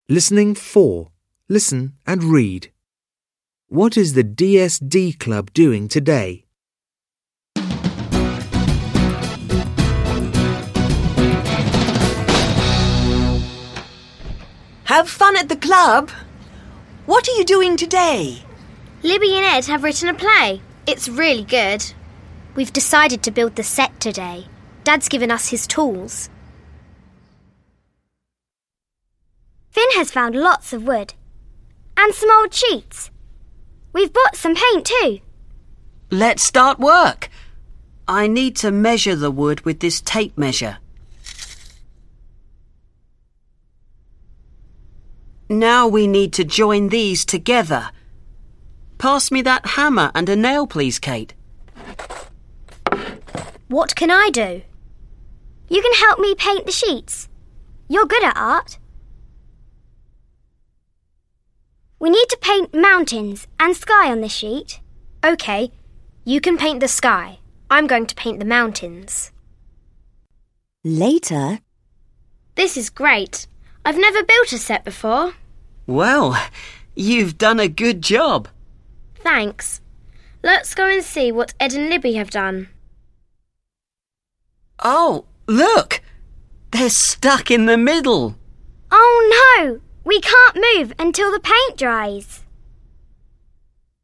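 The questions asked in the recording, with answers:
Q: What is the DSD Club doing today?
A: They are building the set for a play.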